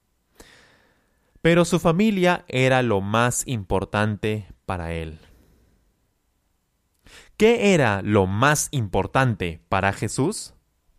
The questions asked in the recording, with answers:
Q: ¿Qué era lo más importante para Jesús?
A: Su familia. Su familia era lo más importante para Jesús.